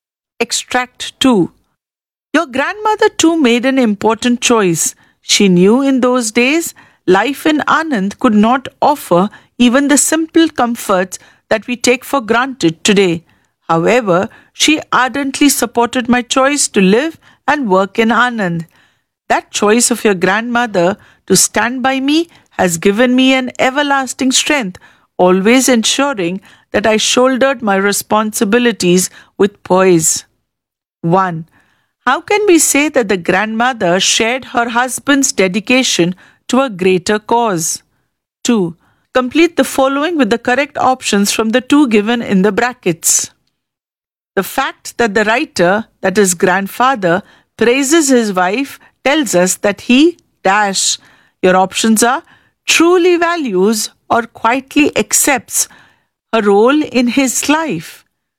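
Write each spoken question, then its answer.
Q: The fact that the writer, that is grandfather, praises his wife tells us that he, dash, your options are, truly values or quietly accepts a role in his life.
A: truly values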